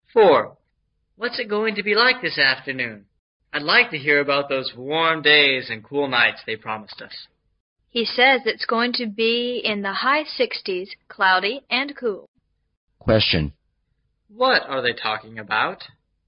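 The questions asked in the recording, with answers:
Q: What are they talking about?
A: The weather forecast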